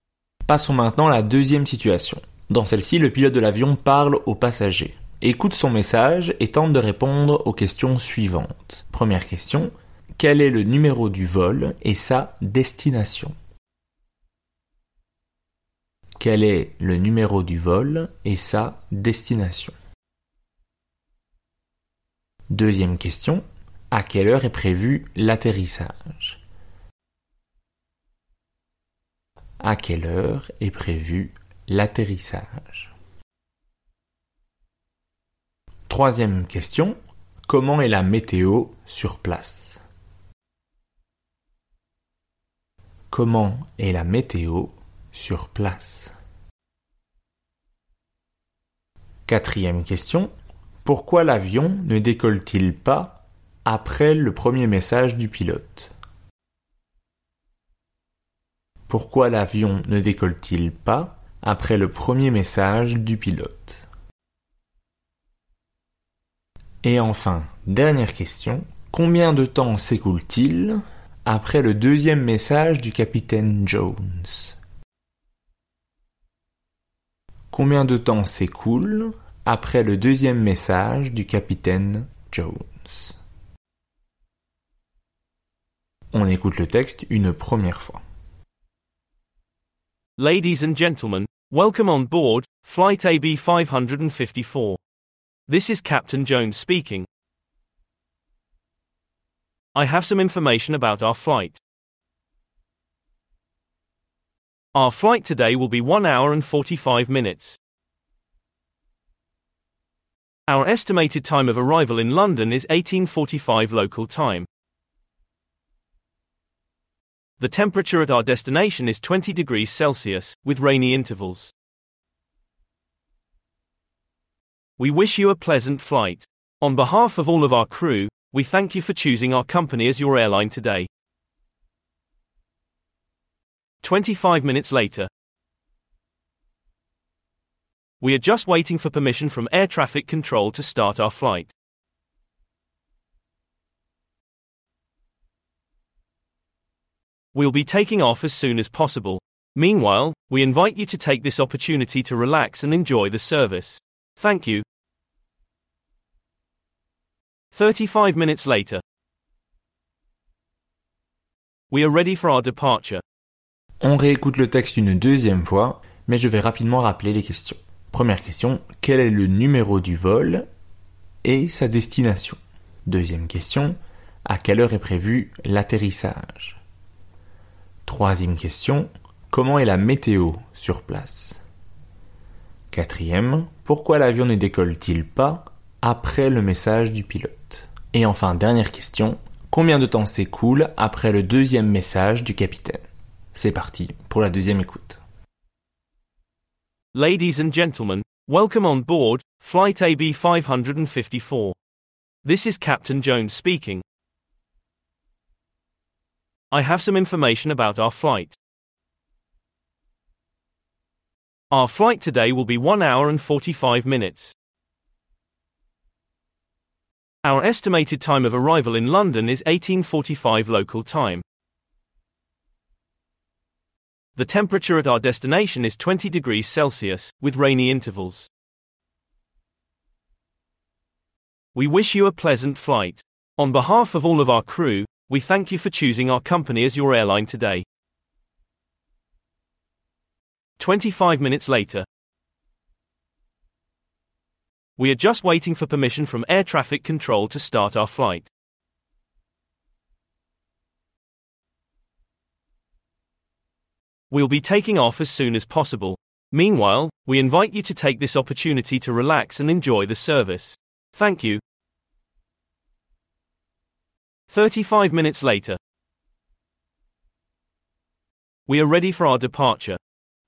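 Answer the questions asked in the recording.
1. Vol AB554 pour Londres
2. 18h45, heure locale
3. 20 degrés Celsius, avec des averses par intervalles
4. Il attend l'autorisation du contrôle aérien
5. 35 minutes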